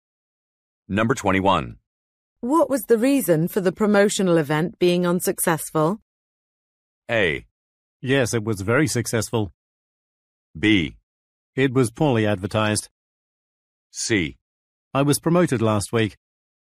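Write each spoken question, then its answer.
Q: What was the reason for the promotional event being unsuccessful?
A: B: It was poorly advertised.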